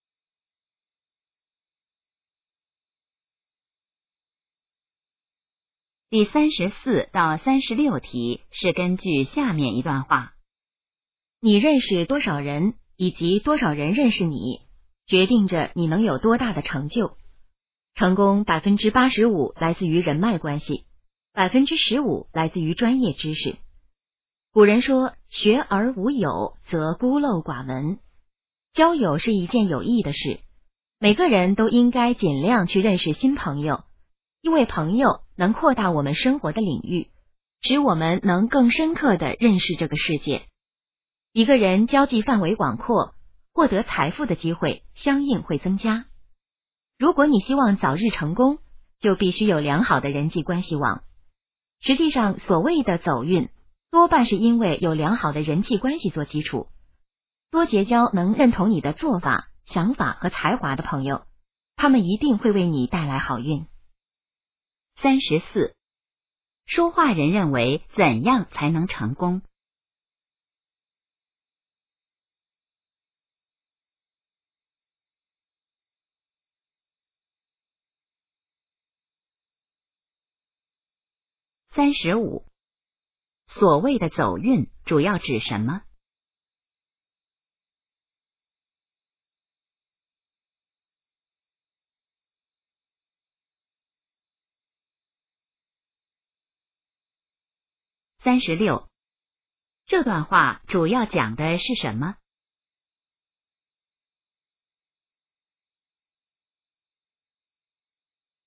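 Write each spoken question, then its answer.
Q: 说话人认为怎样才能成功?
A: 要有良好的人际关系

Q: 所谓的走运主要指什么?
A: 有良好的人际关系做基础

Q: 这段话主要讲的是什么?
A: 人脉关系的重要性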